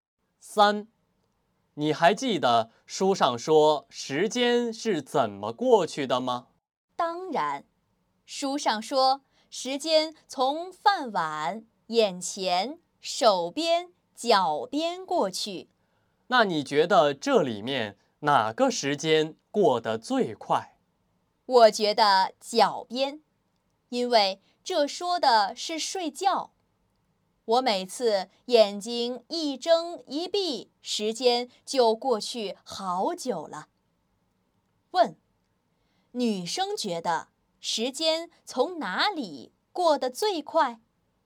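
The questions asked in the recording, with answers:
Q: 女生觉得时间从哪里过得最快?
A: 脚边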